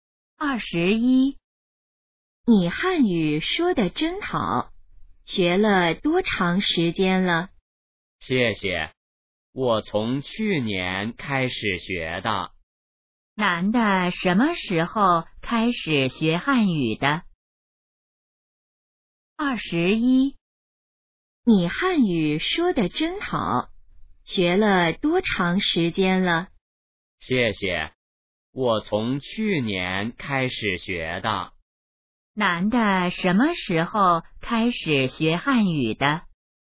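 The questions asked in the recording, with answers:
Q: 男的什么时候开始学汉语的?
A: 去年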